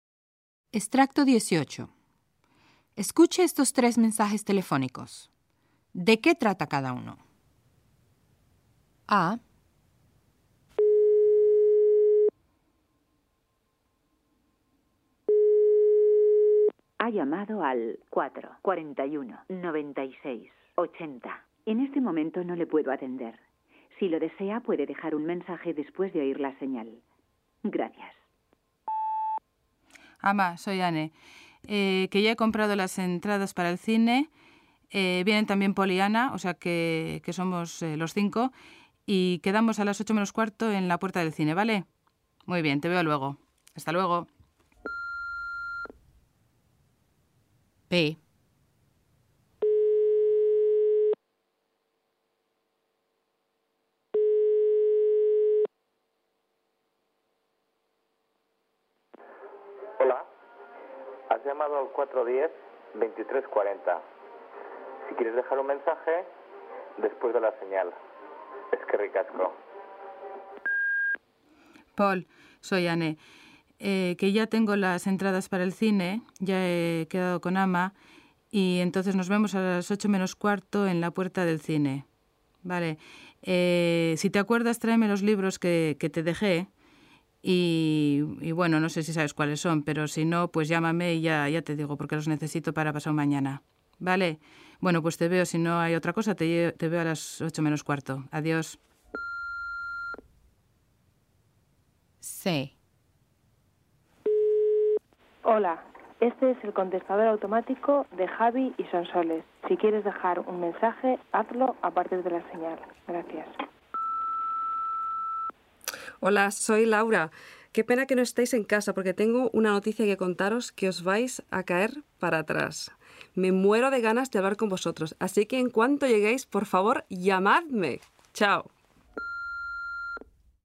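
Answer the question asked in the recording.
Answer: A y B: Anne ha comprado las entradas del cine y quedan a las 8:45 en la puerta (a Paul le pide además que traiga sus libros); C: Laura tiene una noticia y pide que la llamen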